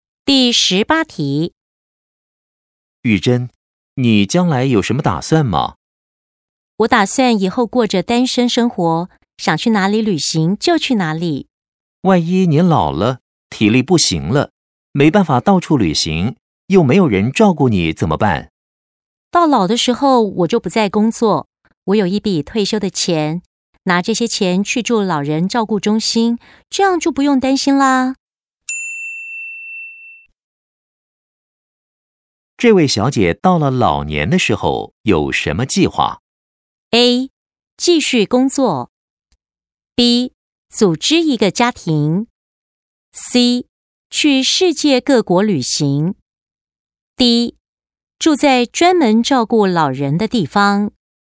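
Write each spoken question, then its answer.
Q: 这位小姐到了老年的时候有什么计划?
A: D: 住在专门照顾老人的地方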